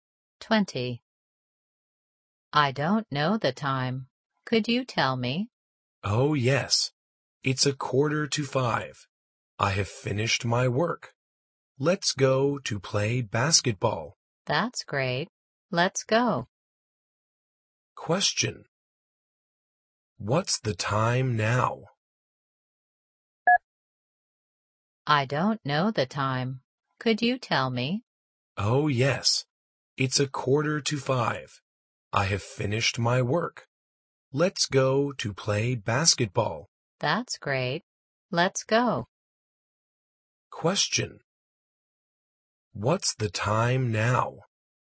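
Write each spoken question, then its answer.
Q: What's the time now?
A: 4:45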